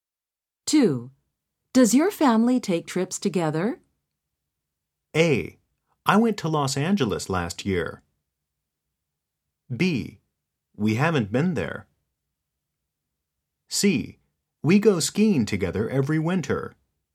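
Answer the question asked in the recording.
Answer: C: We go skiing together every winter.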